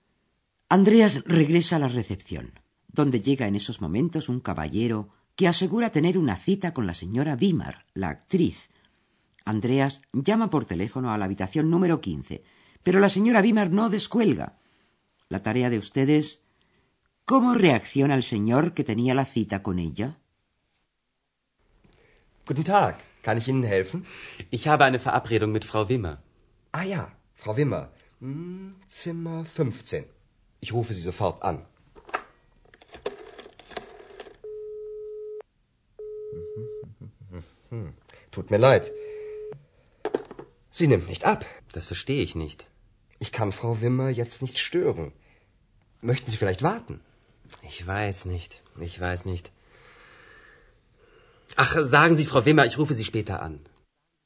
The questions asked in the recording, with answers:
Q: ¿Cómo reacciona el señor que tenía la cita con ella?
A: El visitante le pide a Andreas que le comunique a la señora Wimmer que va a llamarla más tarde.